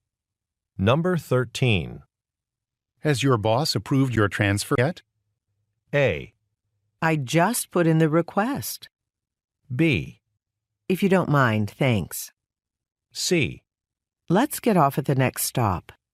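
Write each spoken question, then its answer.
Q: Has your boss approved your transfer yet?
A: A: I just put in the request.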